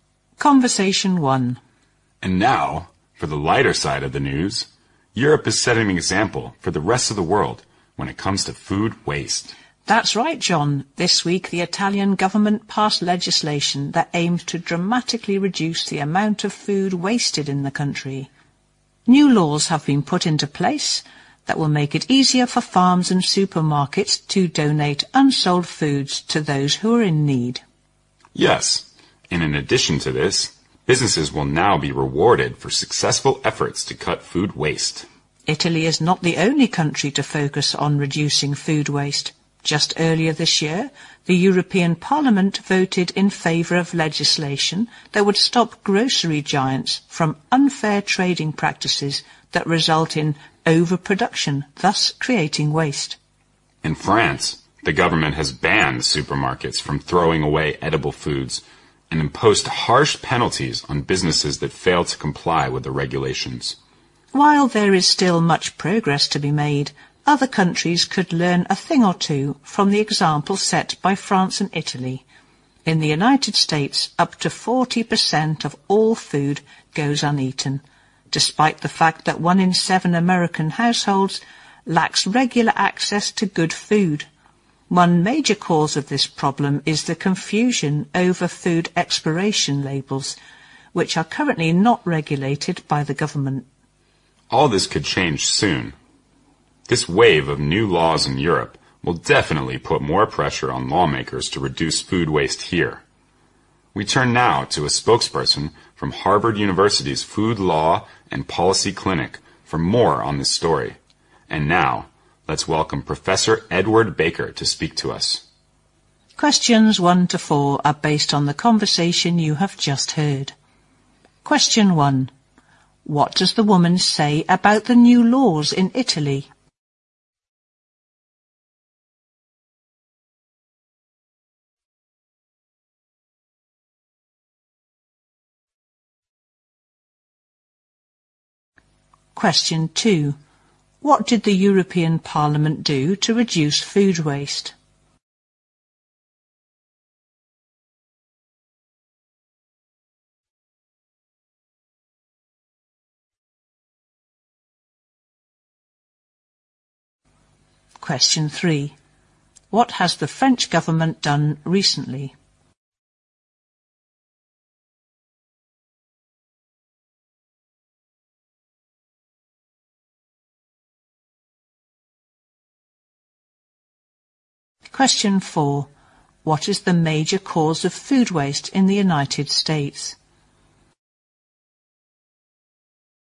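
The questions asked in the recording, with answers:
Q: What does the woman say about the new laws in Italy?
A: They make it easier for farms and supermarkets to donate unsold food to those in need.

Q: What did the European Parliament do to reduce food waste?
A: It voted for legislation to stop grocery giants' unfair trading practices that cause overproduction.

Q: What has the French government done recently?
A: It banned supermarkets from throwing away edible food.

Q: What is the major cause of food waste in the United States?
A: Confusion over food expiration labels.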